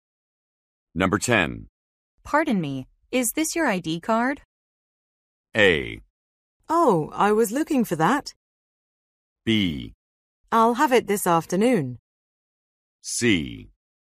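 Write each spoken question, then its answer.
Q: Pardon me, is this your ID card?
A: A: Oh, I was looking for that.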